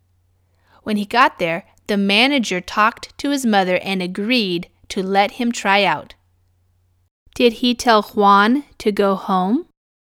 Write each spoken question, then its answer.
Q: Did he tell Juan to go home?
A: No, he didn't tell him to go home.